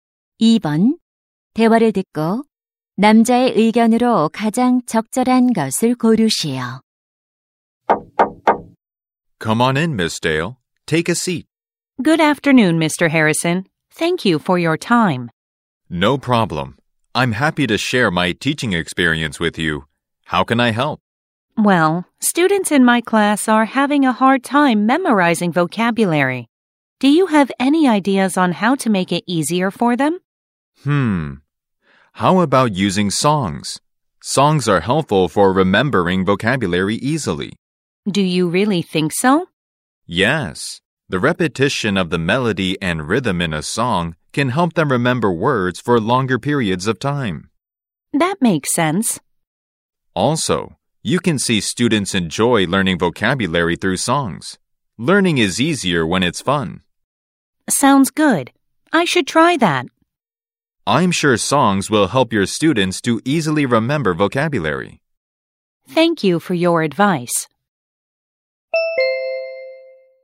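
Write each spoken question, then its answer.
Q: 대화를 듣고 남자의 의견으로 가장 적절한 것을 고르시오.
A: 노래는 어휘를 쉽게 암기하는 데 도움이 된다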